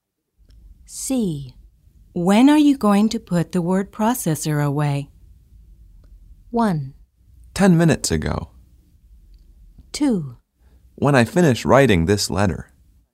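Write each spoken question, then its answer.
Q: When are you going to put the word processor away?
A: 2: When I finish writing this letter.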